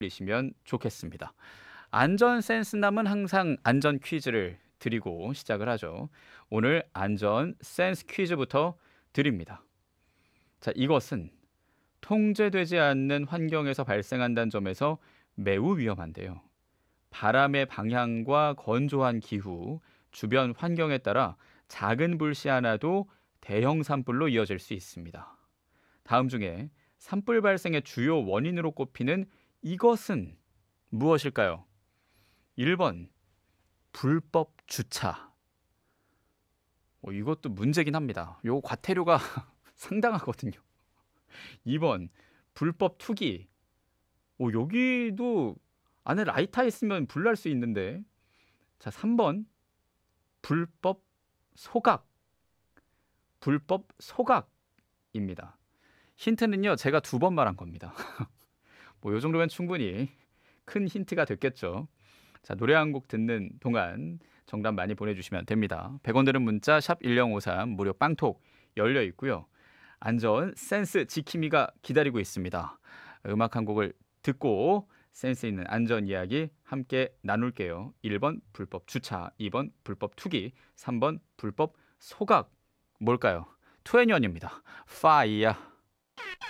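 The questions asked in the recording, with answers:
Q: 다음 중에 산불 발생의 주요 원인으로 꼽히는 이것은 무엇일까요?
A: 3: 불법 소각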